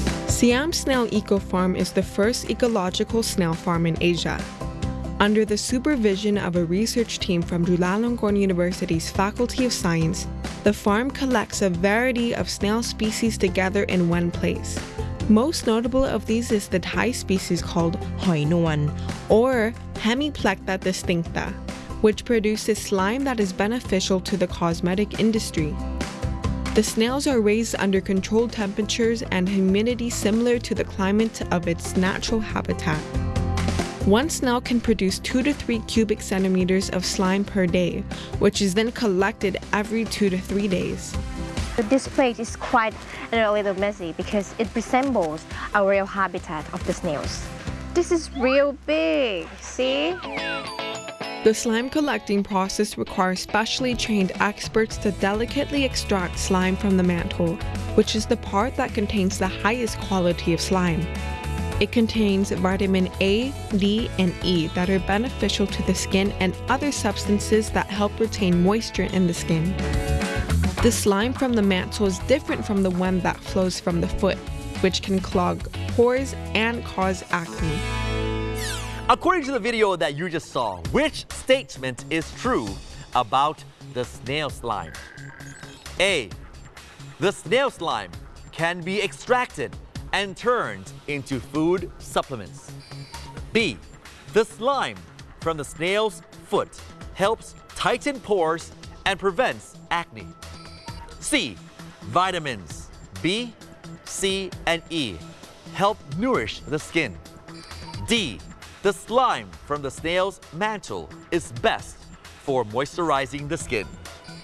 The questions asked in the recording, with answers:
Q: According to the video that you just saw, which statement is true about the snail slime?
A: D. The slime from the snail mantle is best for moisturizing the skin.